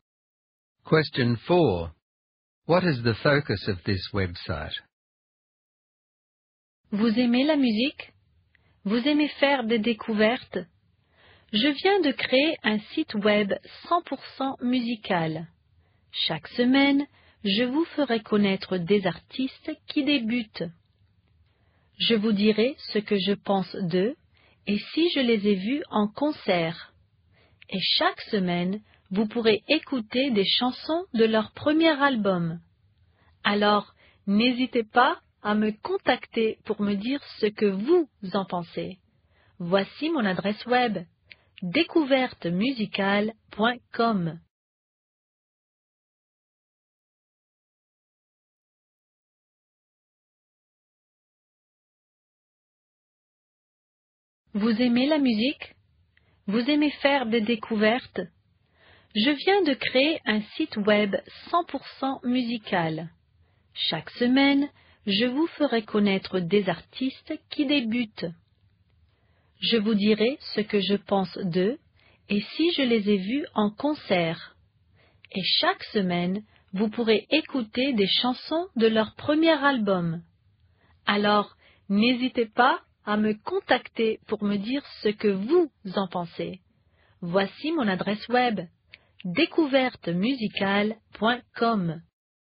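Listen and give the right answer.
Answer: Introducing new, up-and-coming music artists each week, with reviews and songs from their first albums.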